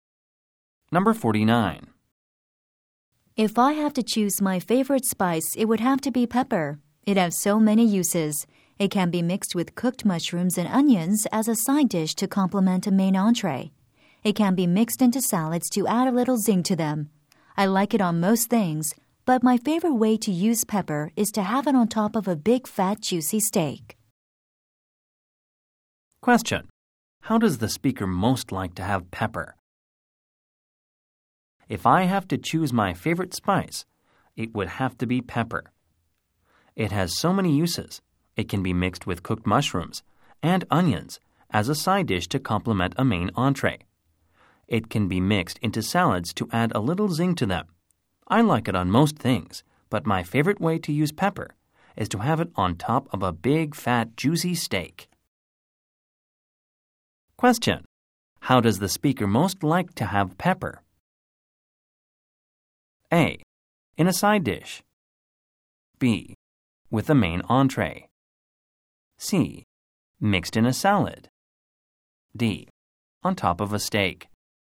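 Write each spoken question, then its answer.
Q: How does the speaker most like to have pepper?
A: D: On top of a steak.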